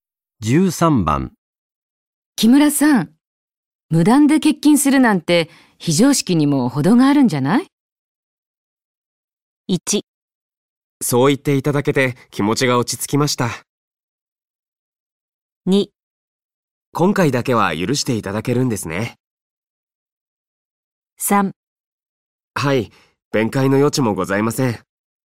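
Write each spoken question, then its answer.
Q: 木村さん、無断で欠勤するなんて非常識にも程があるんじゃない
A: 3: はい、弁解の余地もございません。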